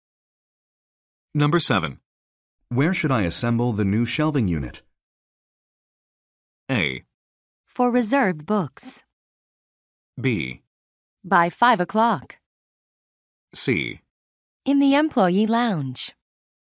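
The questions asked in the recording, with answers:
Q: Where should I assemble the new shelving unit?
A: C: In the employee lounge.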